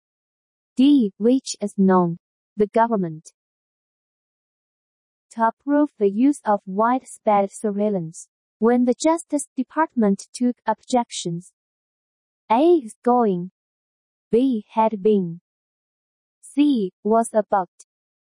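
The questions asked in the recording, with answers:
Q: To approve the use of widespread surveillance, when the Justice Department took objections.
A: C: was about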